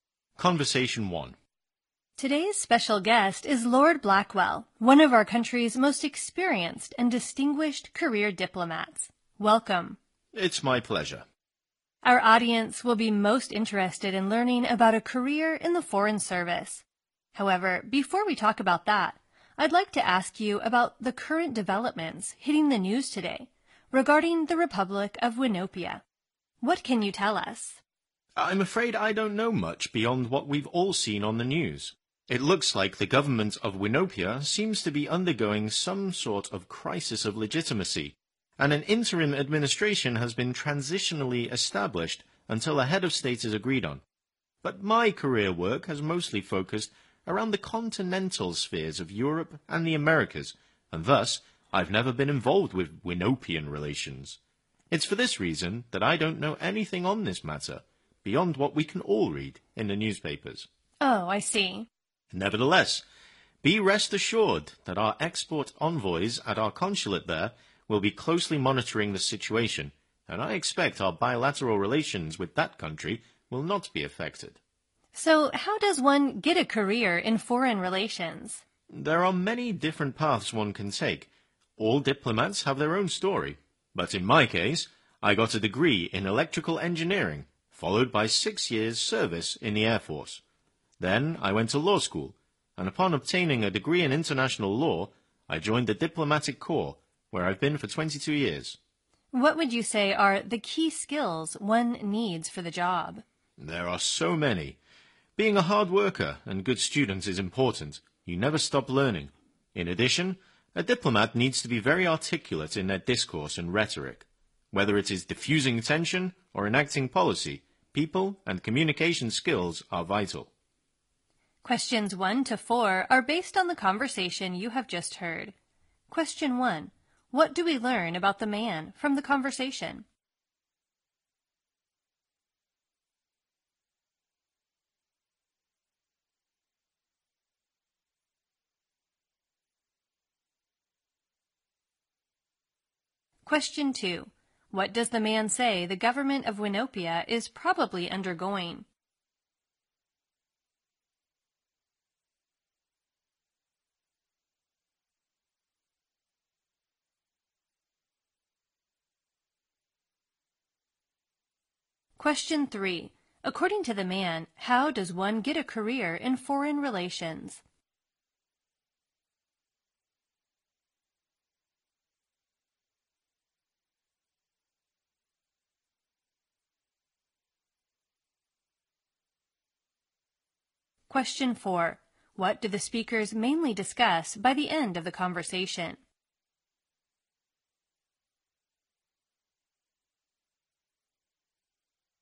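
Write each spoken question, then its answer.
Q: What does the man say the government of Winopia is probably undergoing?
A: A crisis of legitimacy

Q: According to the man, how does one get a career in foreign relations?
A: There are many different paths one can take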